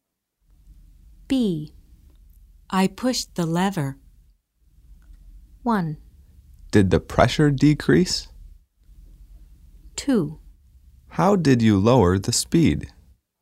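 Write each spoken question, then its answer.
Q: I pushed the lever.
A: 2: How did you lower the speed?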